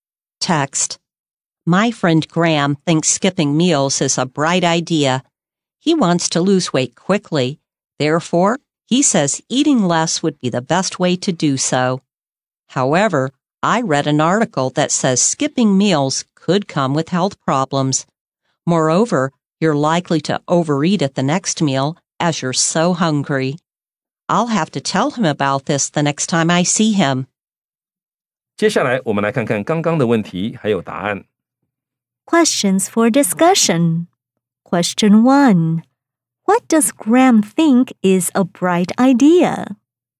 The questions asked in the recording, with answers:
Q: What does Graham think is a bright idea?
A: He thinks skipping meals is a bright idea.